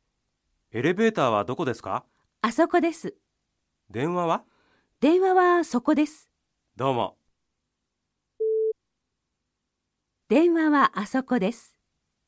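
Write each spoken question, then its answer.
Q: 電話はあそこです。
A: ×(電話はそこです)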